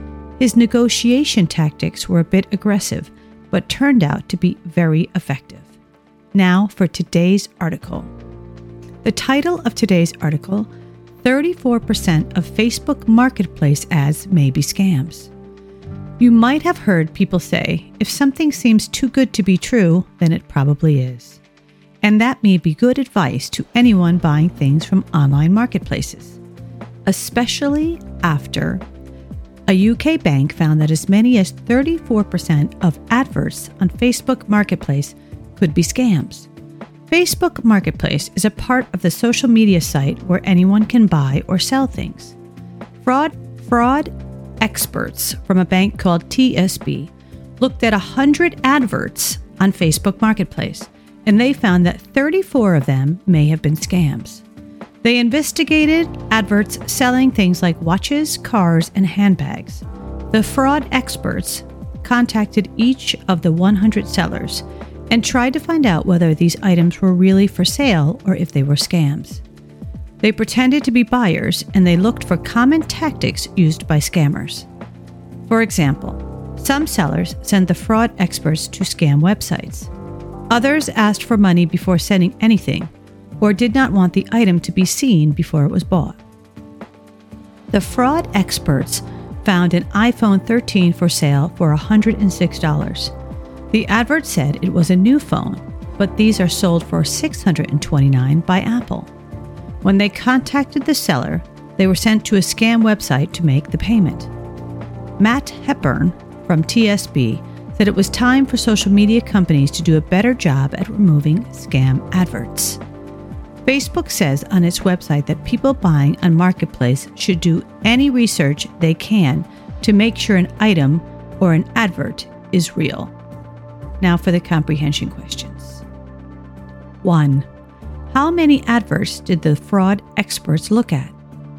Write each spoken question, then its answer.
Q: How many adverts did the fraud experts look at?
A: Answer, 100.